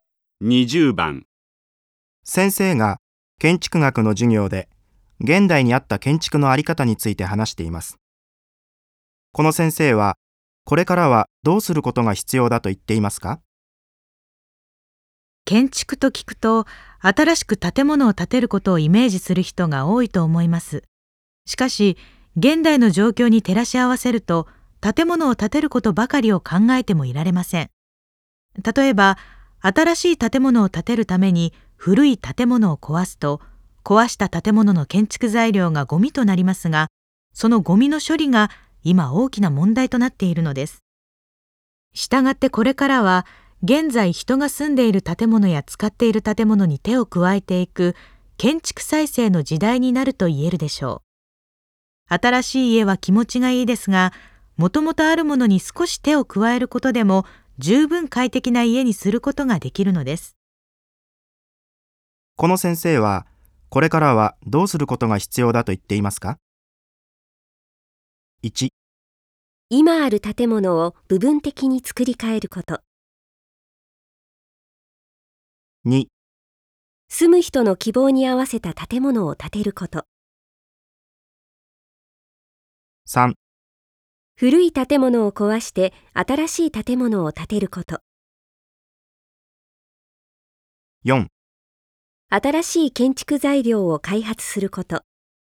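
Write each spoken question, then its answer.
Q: この先生はこれからはどうすることが必要だと言っていますか?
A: 1: 今ある建物を部分的に作り変えること。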